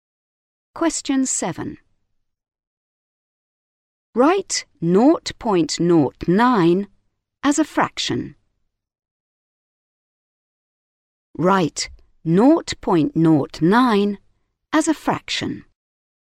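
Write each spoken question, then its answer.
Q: Write 0.09 as a fraction.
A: 9/100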